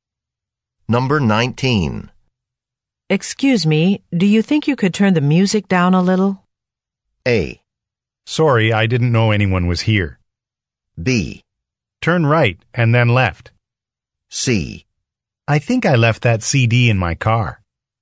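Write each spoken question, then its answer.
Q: Excuse me, do you think you could turn the music down a little?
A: A: Sorry, I didn't know anyone was here.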